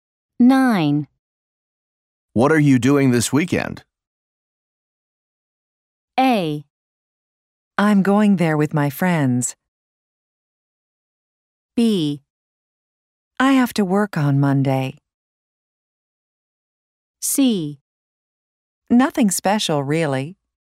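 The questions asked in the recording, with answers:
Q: What are you doing this weekend?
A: C: Nothing special, really.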